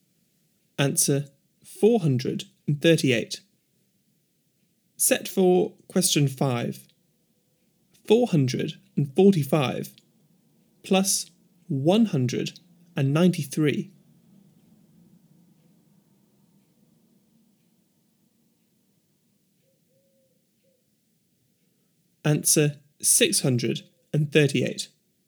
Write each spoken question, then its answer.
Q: 445 plus 193.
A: Answer 638.